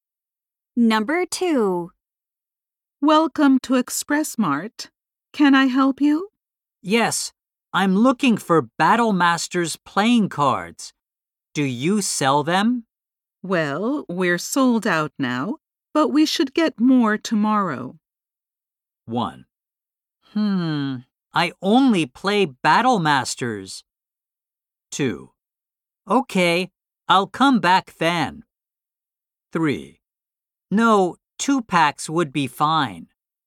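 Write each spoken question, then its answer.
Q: Well, we're sold out now, but we should get more tomorrow.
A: 2: Okay, I'll come back then.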